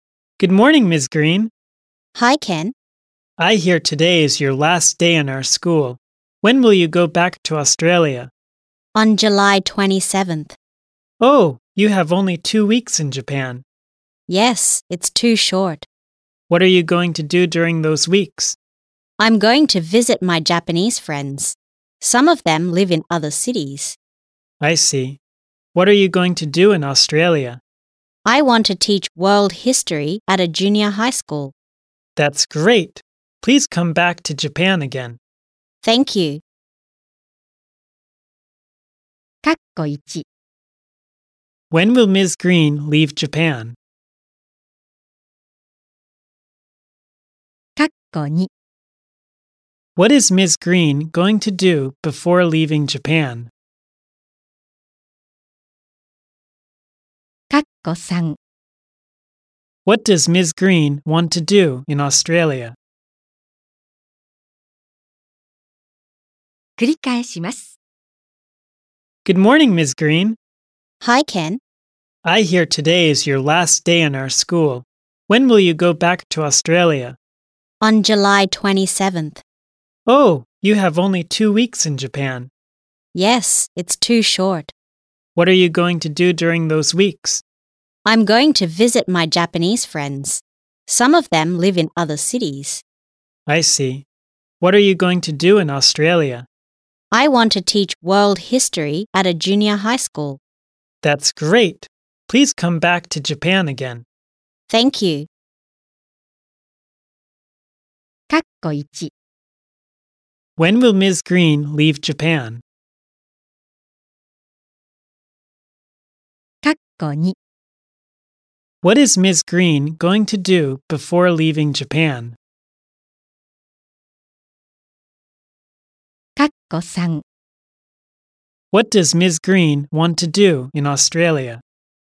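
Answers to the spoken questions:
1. On July 27th
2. Visit her Japanese friends
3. Teach world history at a junior high school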